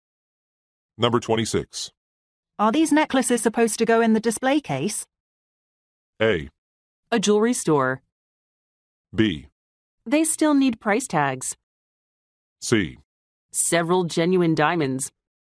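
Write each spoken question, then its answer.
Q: Are these necklaces supposed to go in the display case?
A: B: They still need price tags.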